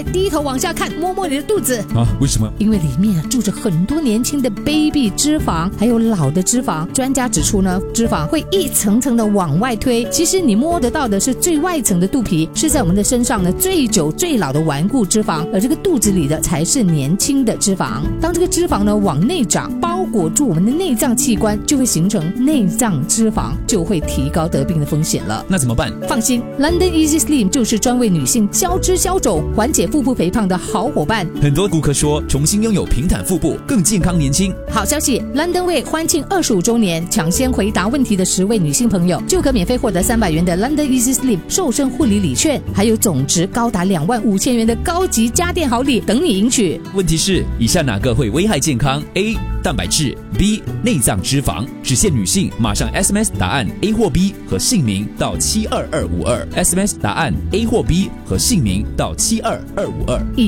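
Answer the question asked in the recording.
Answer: B: 内脏脂肪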